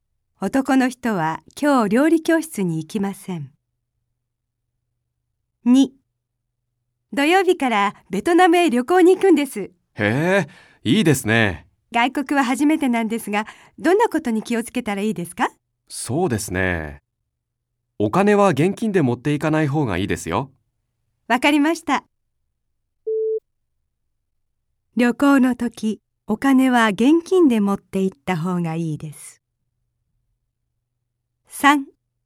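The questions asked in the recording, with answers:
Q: 旅行の時、お金は現金で持って行った方がいいです。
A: ×(正しくない)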